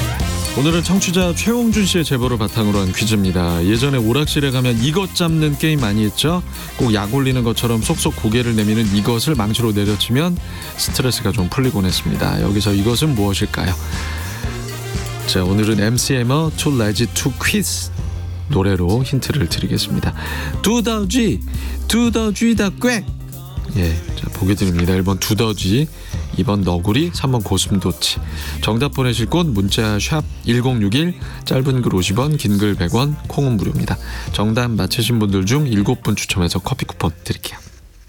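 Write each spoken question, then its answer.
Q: 여기서 이것은 무엇일까요?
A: 1: 두더쥐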